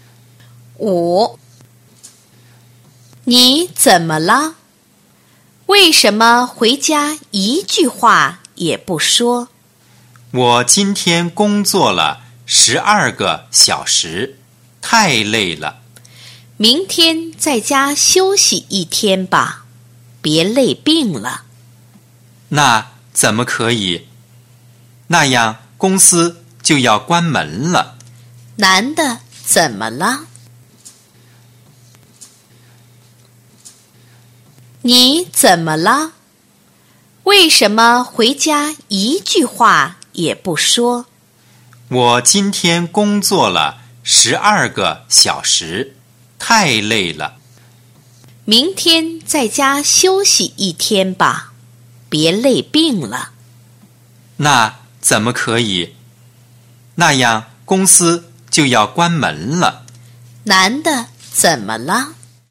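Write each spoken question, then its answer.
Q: 男的怎么了?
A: 工作太累了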